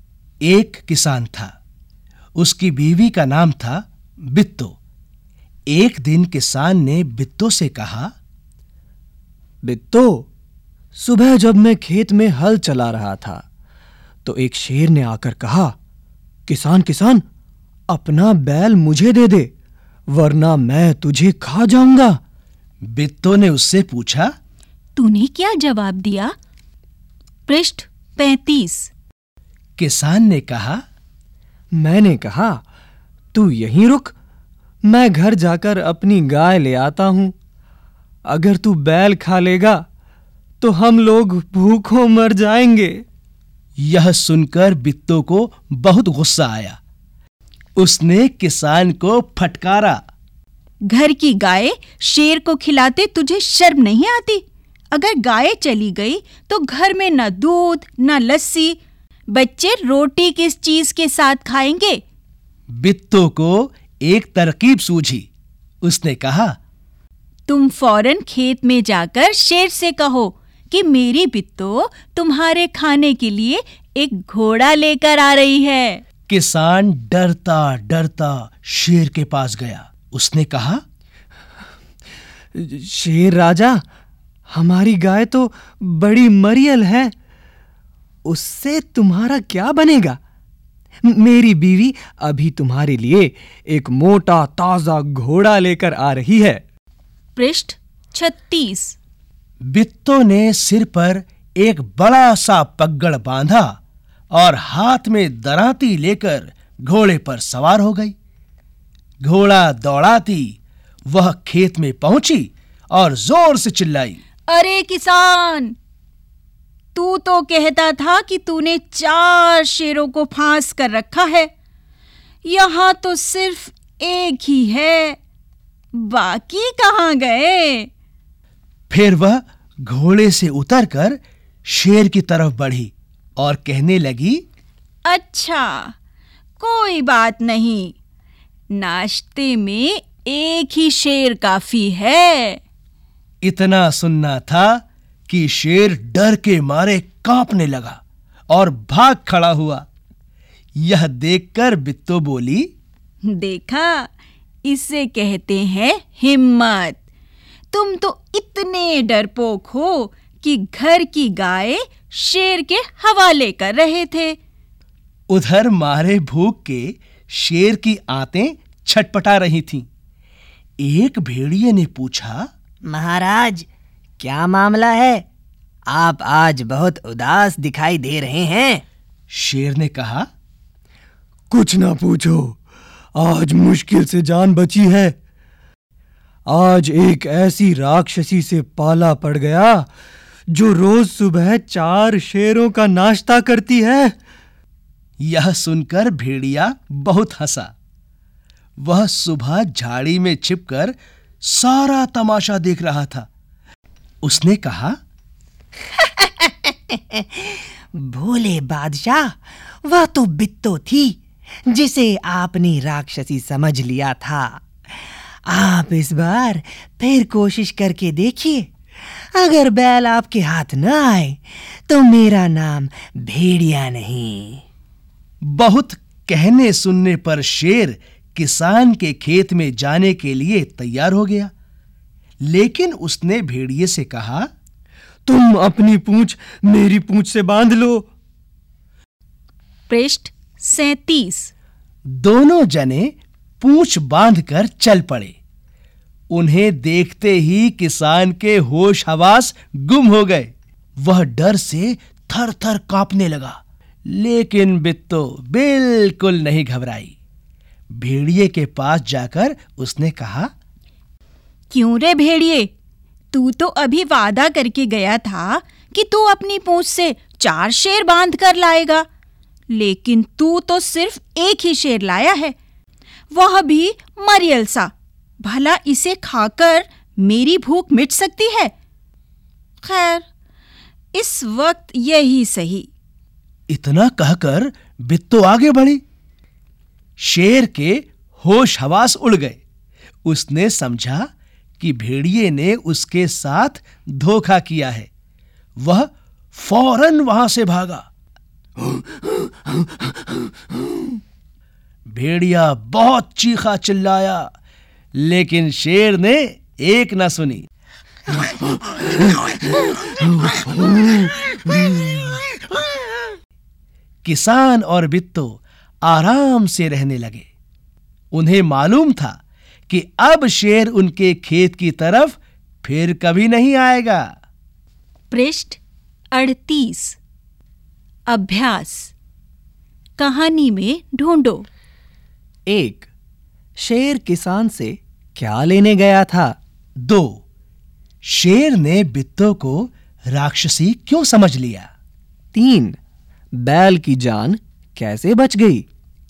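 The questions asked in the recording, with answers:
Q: शेर किसान से क्या लेने गया था?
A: किसान का बैल

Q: शेर ने बित्तो को राक्षसी क्यों समझ लिया?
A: क्योंकि बित्तो ने कहा कि किसान ने 4 शेर फांस कर रखे हैं और नाश्ते में एक ही शेर काफी है

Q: बैल की जान कैसे बच गई?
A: बित्तो की हिम्मत और तरकीब से शेर डरकर भाग गया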